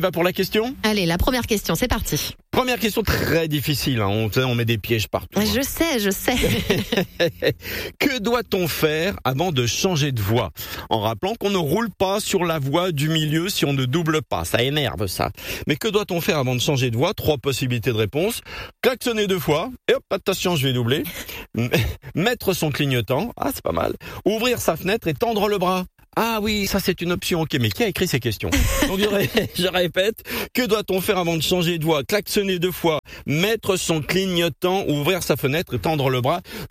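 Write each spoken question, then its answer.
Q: Que doit-on faire avant de changer de voie ?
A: Mettre son clignotant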